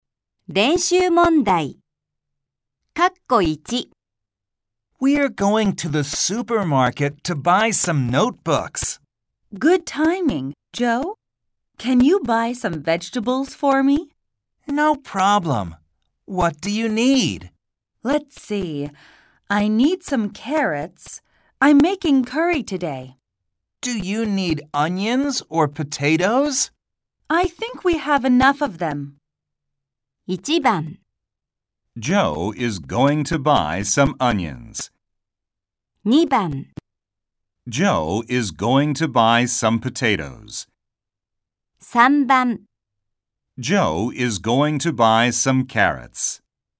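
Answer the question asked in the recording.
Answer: 3: Joe is going to buy some carrots.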